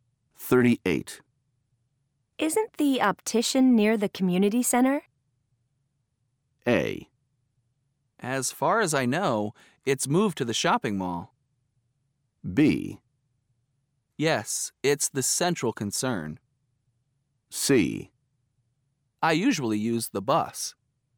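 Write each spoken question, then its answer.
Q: Isn't the optician near the community center?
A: A: As far as I know, it's moved to the shopping mall.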